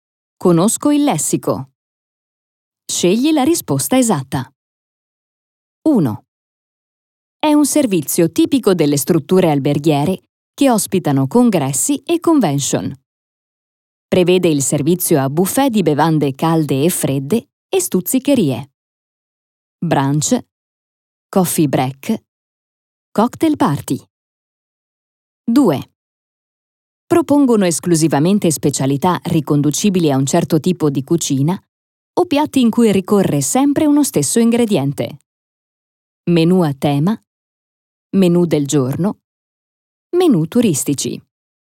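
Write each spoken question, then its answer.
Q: È un servizio tipico delle strutture alberghiere che ospitano congressi e convention. Prevede il servizio a buffet di bevande calde e fredde e stuzzicherie.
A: B: coffee break

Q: Propongono esclusivamente specialità riconducibili a un certo tipo di cucina o piatti in cui ricorre sempre uno stesso ingrediente.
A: A: Menù a tema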